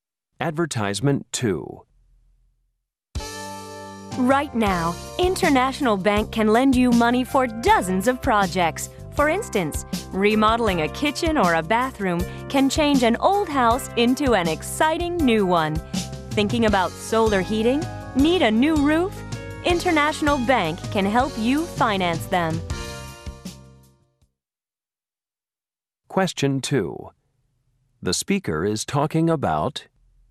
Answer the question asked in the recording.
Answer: For any home improvement loan, talk to International Bank first.